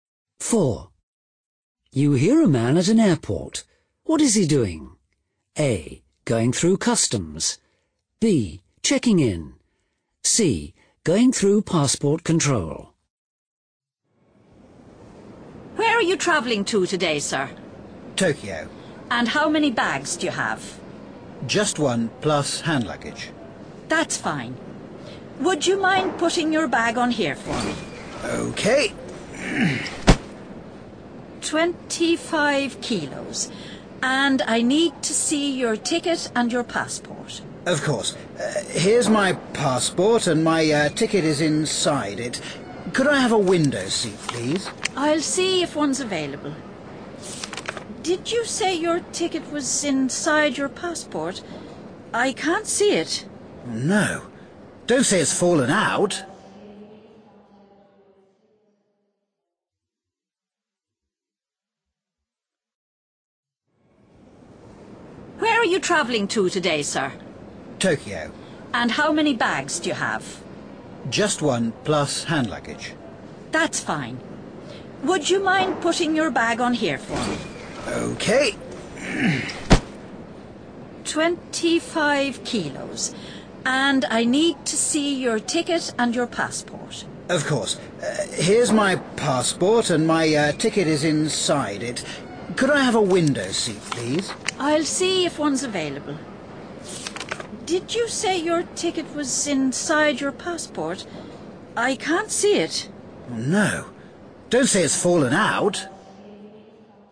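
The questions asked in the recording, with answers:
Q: What is he doing?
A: B: Checking in.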